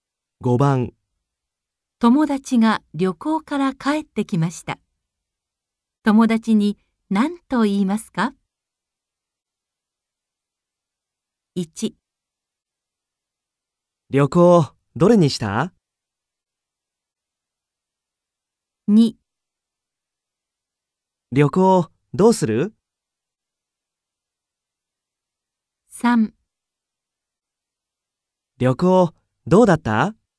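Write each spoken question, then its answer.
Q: 友達が旅行から帰ってきました。友達に何と言いますか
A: 3: 旅行どうだった?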